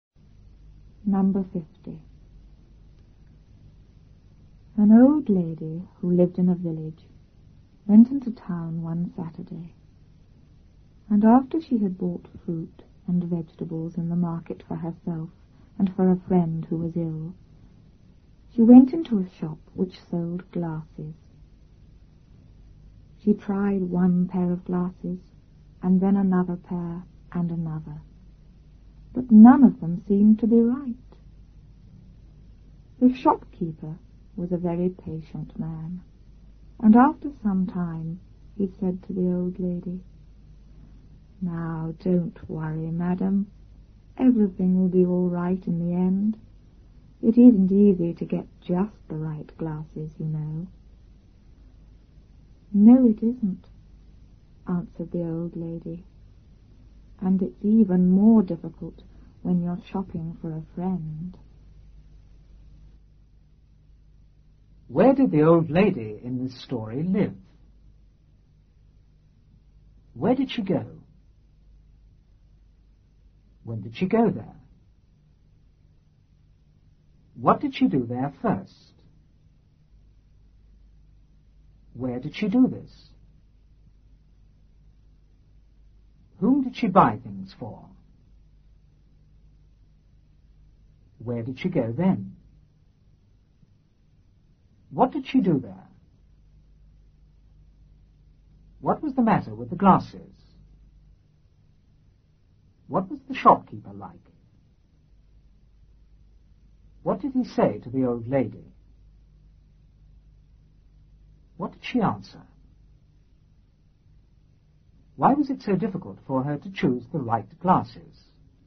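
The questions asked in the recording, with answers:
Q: Where did the old lady in this story live?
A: In a village

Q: Where did she go?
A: Into town

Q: When did she go there?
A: One Saturday

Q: What did she do there first?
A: She bought fruit and vegetables

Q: Where did she do this?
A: In the market

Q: Whom did she buy things for?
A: For herself and for a friend who was ill

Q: Where did she go then?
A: Into a shop which sold glasses

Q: What did she do there?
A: She tried on pairs of glasses

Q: What was the matter with the glasses?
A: None of them seemed to be right

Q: What was the shopkeeper like?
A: Very patient

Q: What did he say to the old lady?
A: Don't worry, everything will be all right in the end; it isn't easy to get just the right glasses

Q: What did she answer?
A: No, it isn't, and it's even more difficult when you're shopping for a friend

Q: Why was it so difficult for her to choose the right glasses?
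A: She was shopping for a friend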